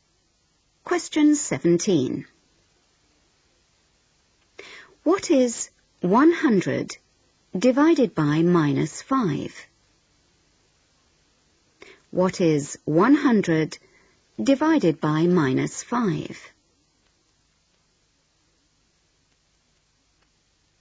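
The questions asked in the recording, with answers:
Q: What is 100 divided by minus 5?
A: -20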